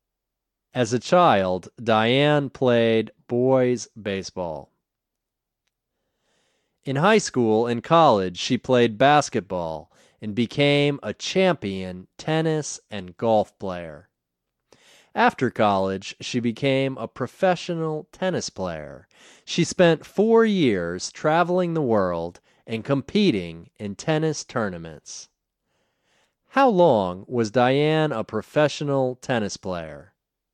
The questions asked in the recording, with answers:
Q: How long was Diane a professional tennis player?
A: Diane was a professional tennis player for 4 years.